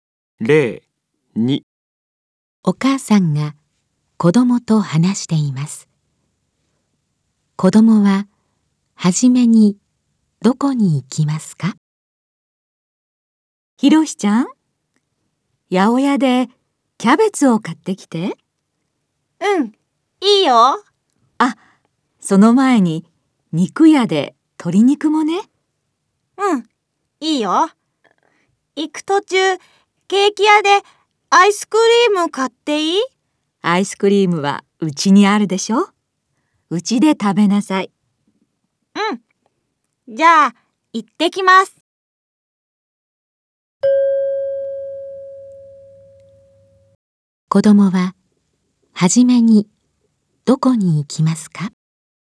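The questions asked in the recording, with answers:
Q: 子供は初めにどこに行きますか?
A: 肉屋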